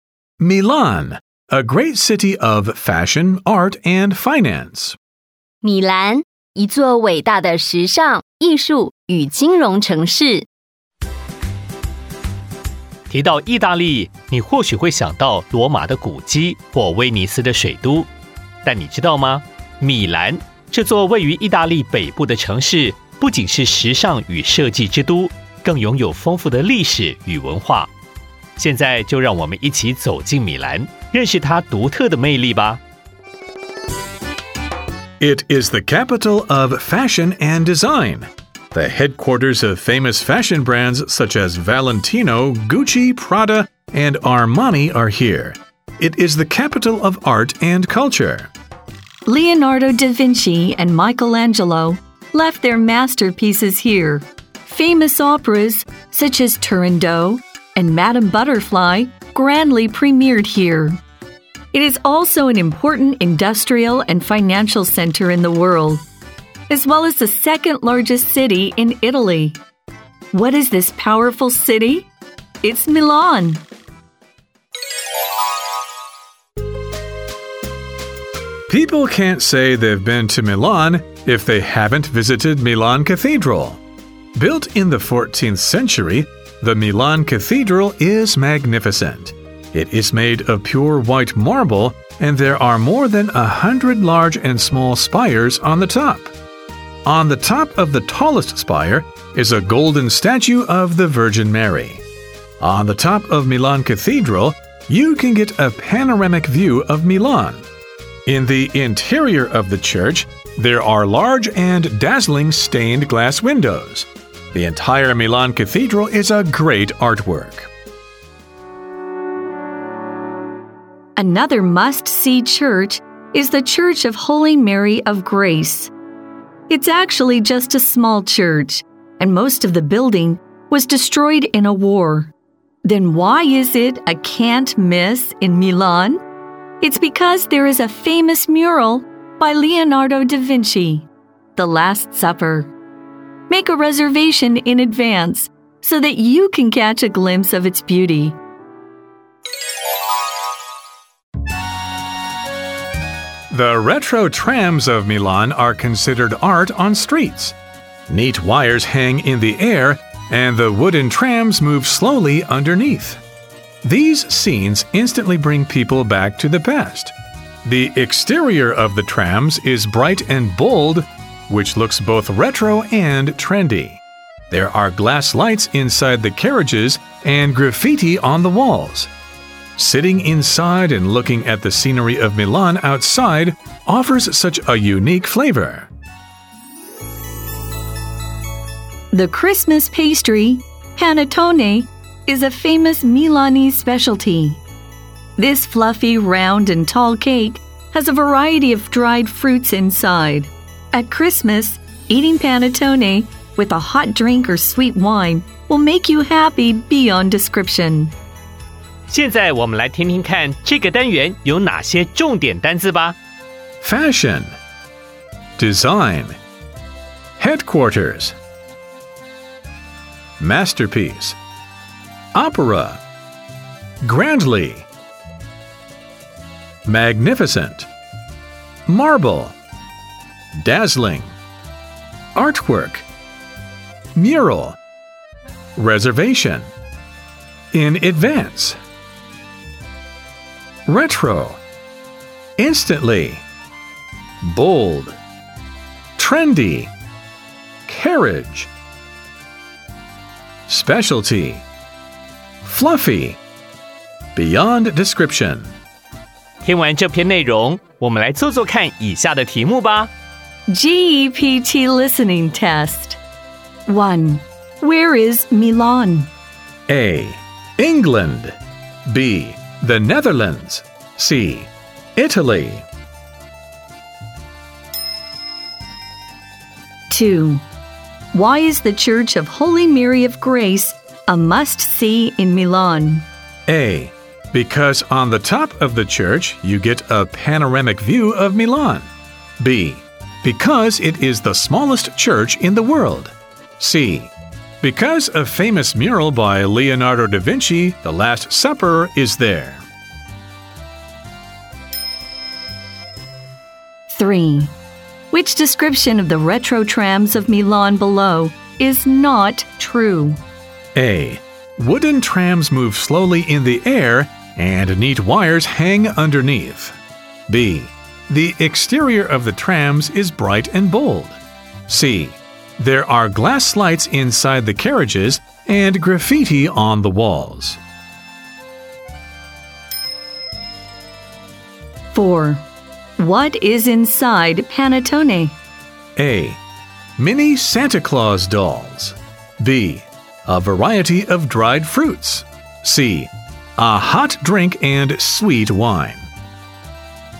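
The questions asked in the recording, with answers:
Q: Where is Milan?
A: C: Italy.

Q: Why is the Church of Holy Mary of Grace a must-see in Milan?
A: C: Because a famous mural by Leonardo da Vinci, The Last Supper, is there.

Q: which description of the retro trams of Milan below is not true?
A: A: Wooden trams move slowly in the air and neat wires hang underneath.

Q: What is inside Panettone?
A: B: A variety of dried fruits.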